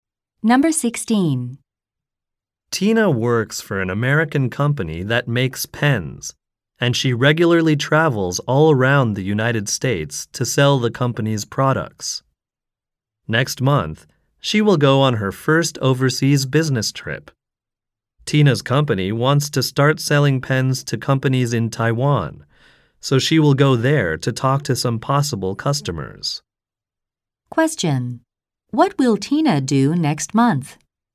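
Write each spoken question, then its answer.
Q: What will Tina do next month?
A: Go to Taiwan on her first overseas business trip to sell pens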